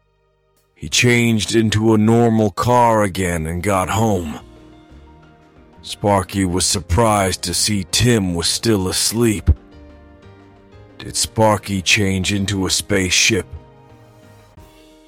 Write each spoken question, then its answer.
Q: Did Sparky change into a spaceship?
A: No, he didn't.